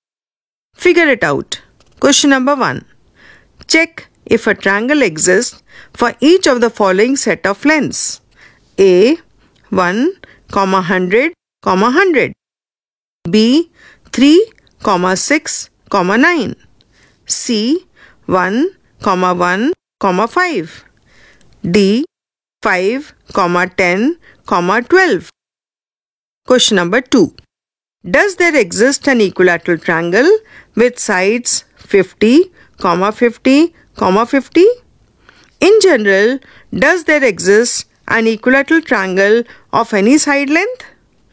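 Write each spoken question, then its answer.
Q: 1, 100, 100.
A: Yes, a triangle exists

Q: 5, 10, 12.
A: Yes, a triangle exists

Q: Does there exist an equilateral triangle with sides 50, 50, 50?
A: Yes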